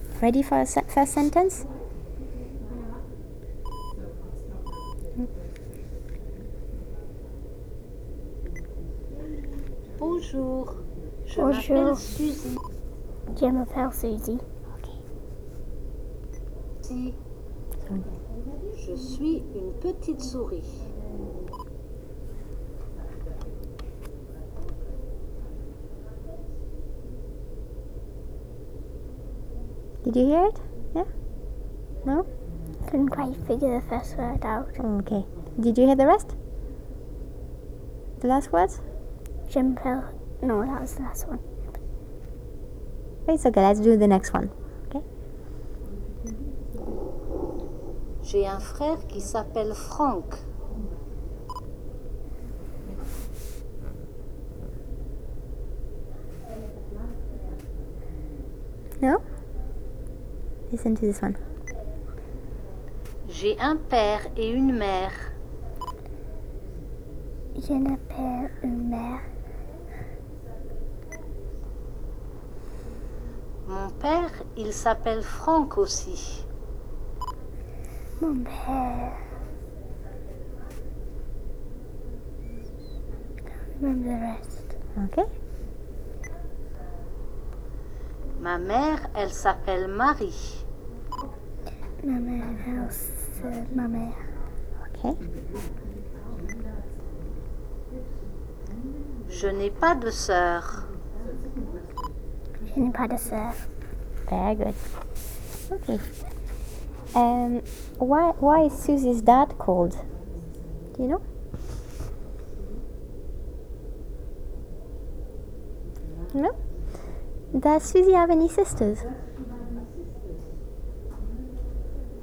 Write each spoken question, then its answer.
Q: Does Susie have any sisters?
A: She doesn't.